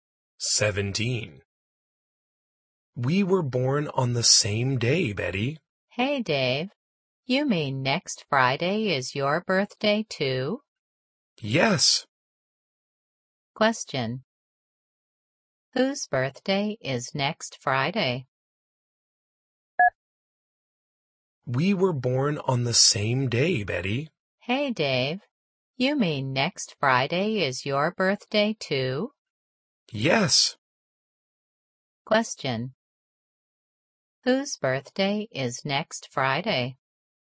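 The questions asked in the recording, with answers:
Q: Whose birthday is next Friday?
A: Both Betty's and Dave's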